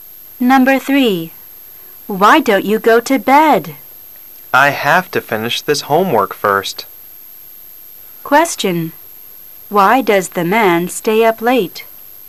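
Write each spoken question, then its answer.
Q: Why does the man stay up late?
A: He has to finish his homework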